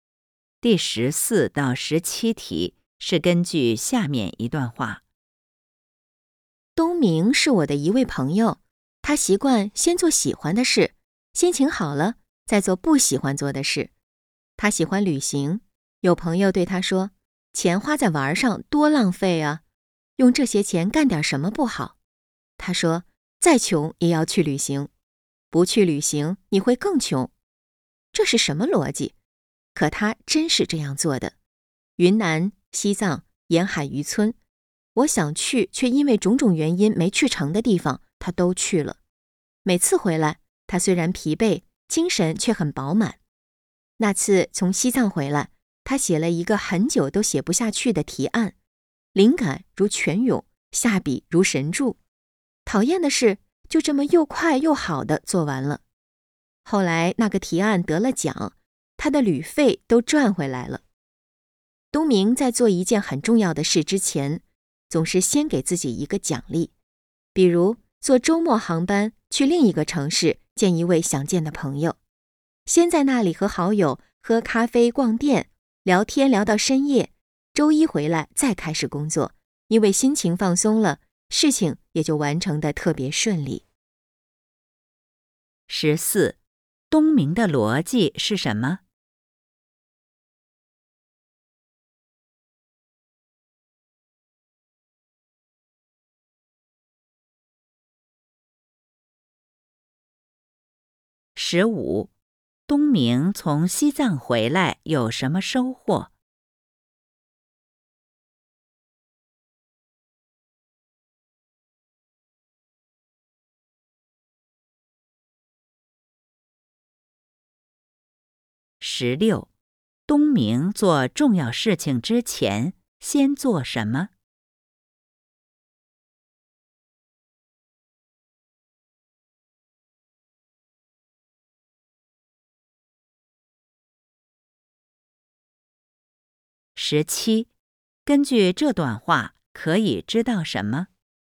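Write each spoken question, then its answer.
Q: 东明的逻辑是什么?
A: 再穷也要去旅行,不去旅行会更穷

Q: 东明从西藏回来有什么收获?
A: 灵感如泉涌,很快写完了提案,提案还得了奖

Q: 东明做重要事情之前先做什么?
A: 先给自己一个奖励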